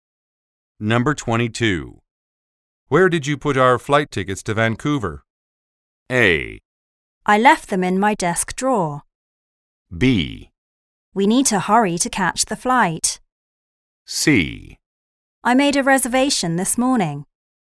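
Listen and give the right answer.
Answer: A: I left them in my desk drawer.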